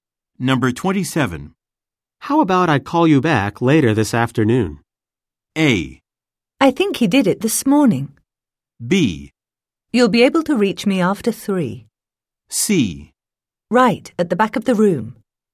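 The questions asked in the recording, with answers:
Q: How about I call you back later this afternoon?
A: B: You'll be able to reach me after three.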